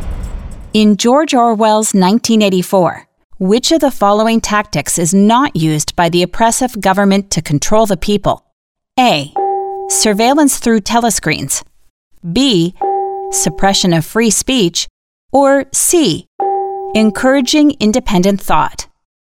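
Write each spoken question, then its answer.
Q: In George Orwell's 1984, which of the following tactics is not used by the oppressive government to control the people?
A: C: Encouraging independent thought.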